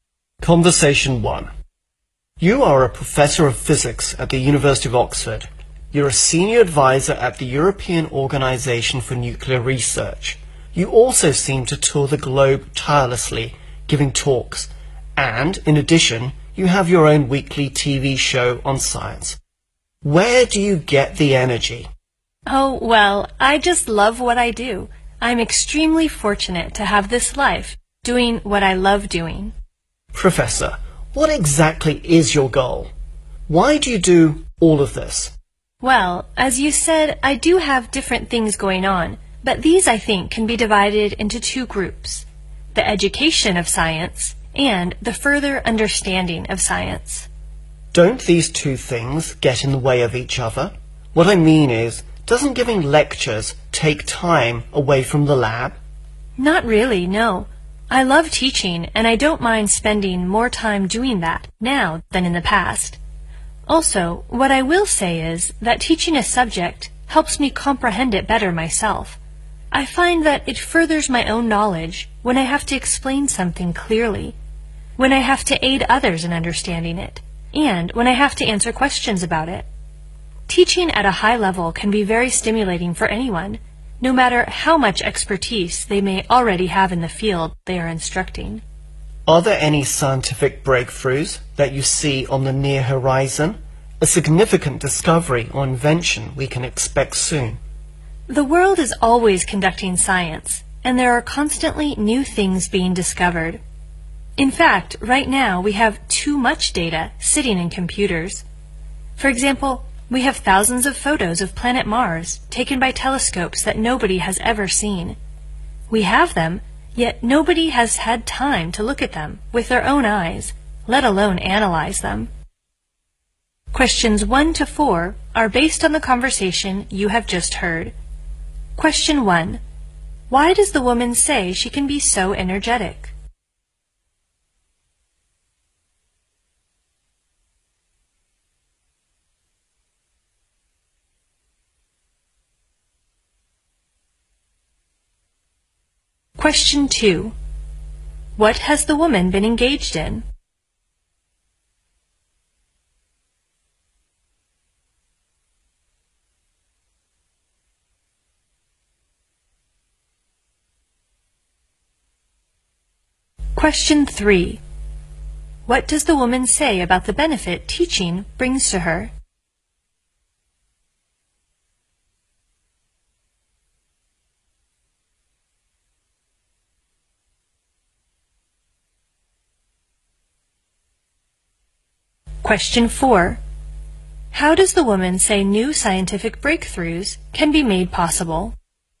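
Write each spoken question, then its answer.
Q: Why does the woman say she can be so energetic?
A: She loves what she does.

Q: What has the woman been engaged in?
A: Science education and furthering the understanding of science

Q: What does the woman say about the benefit teaching brings to her?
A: It helps her understand the subject better herself.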